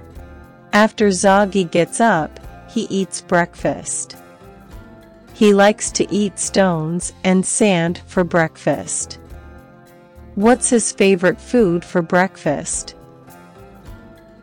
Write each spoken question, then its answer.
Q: What's his favorite food for breakfast?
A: Stones and sand. He likes to eat stones and sand for breakfast.